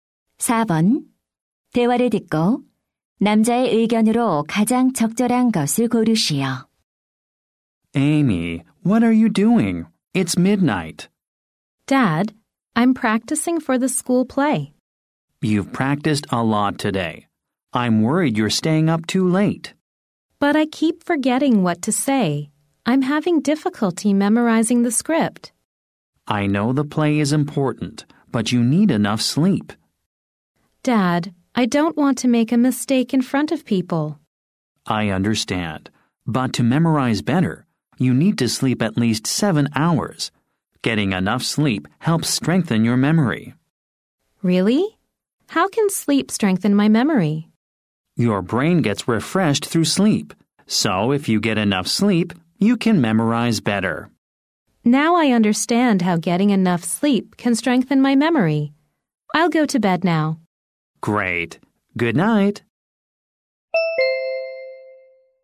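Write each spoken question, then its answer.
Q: 대화를 듣고 남자의 의견으로 가장 적절한 것을 고르시오.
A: 충분한 수면은 기억력 강화에 도움이 된다.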